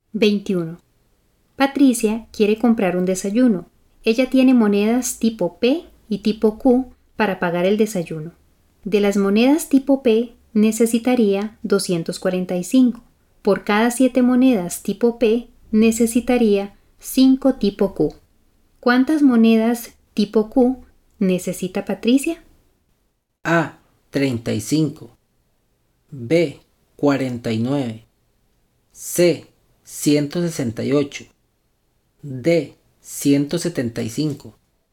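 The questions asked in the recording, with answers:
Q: ¿Cuántas monedas tipo Q necesita Patricia?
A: D: 175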